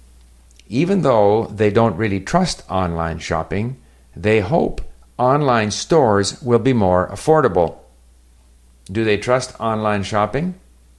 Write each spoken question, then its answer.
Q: Do they trust online shopping?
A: No, they don't really trust online shopping.